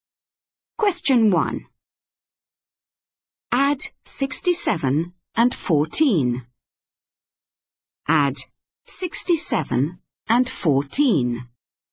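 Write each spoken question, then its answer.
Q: Add 67 and 14.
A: 81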